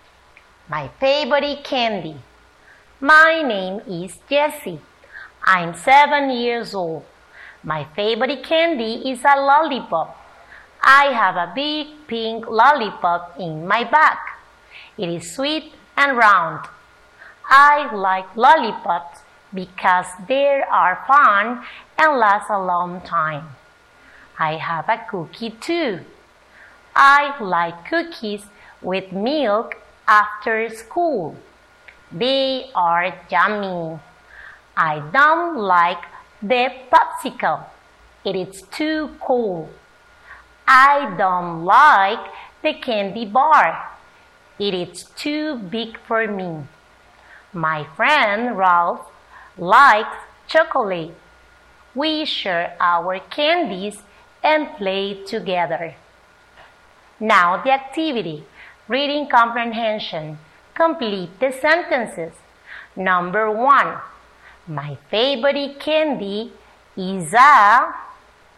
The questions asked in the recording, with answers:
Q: my favorite candy is a...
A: Lollipop.